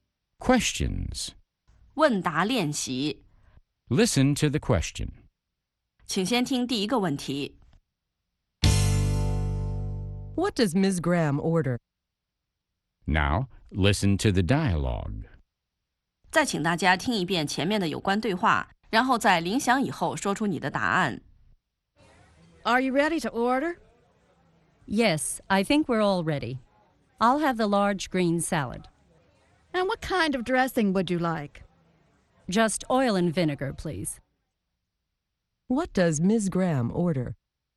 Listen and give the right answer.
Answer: She orders a large green salad with oil and vinegar dressing.